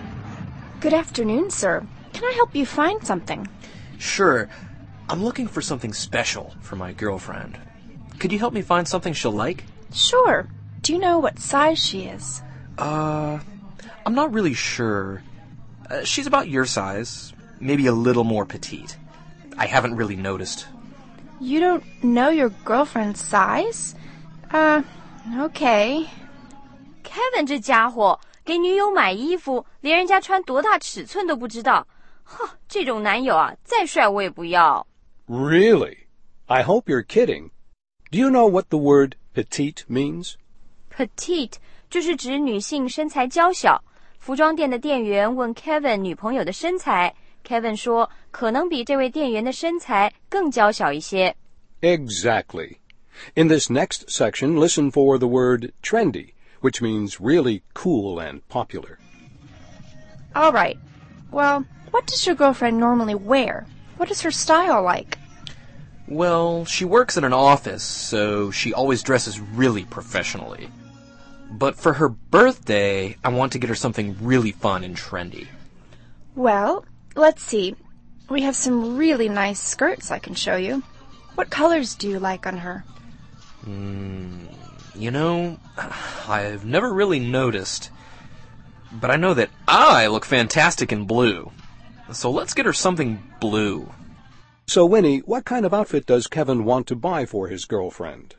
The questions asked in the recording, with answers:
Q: So, Winnie, what kind of outfit does Kevin want to buy for his girlfriend?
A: 他说女友平时在办公室都穿职业装,所以呢,想给她换个风格,来件活泼时髦的衣服。